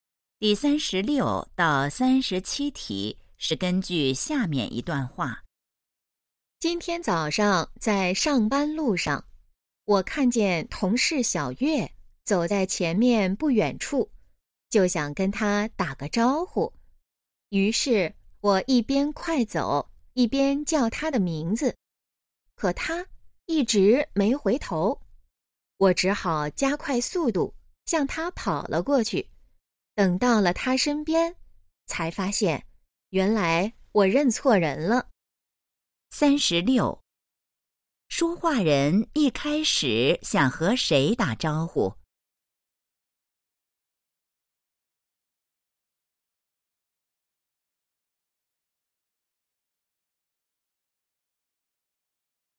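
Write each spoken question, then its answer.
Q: 说话人一开始想和谁打招呼?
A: 同事小月

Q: 说话人怎么了?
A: 认错人了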